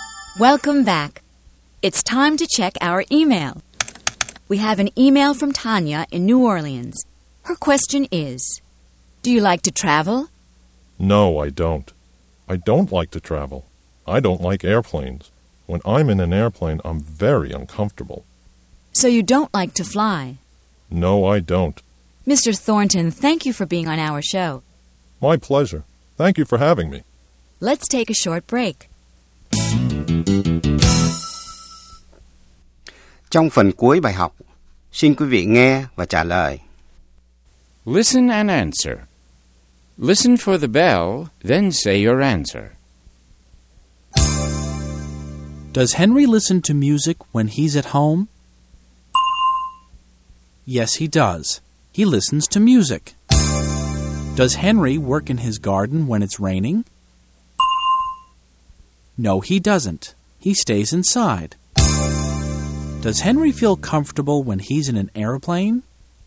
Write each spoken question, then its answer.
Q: Does Henry feel comfortable when he's in an airplane?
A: No, he doesn't. He feels very uncomfortable.